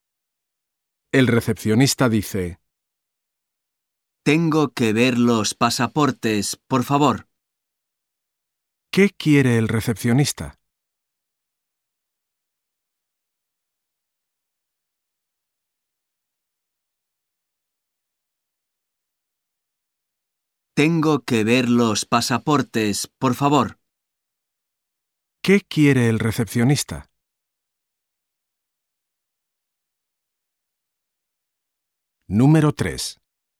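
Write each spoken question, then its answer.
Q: ¿Qué quiere el recepcionista?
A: Ver los pasaportes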